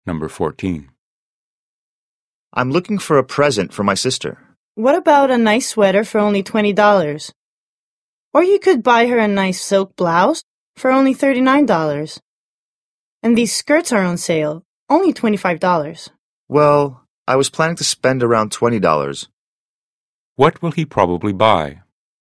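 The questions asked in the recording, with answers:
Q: What will he probably buy?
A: A sweater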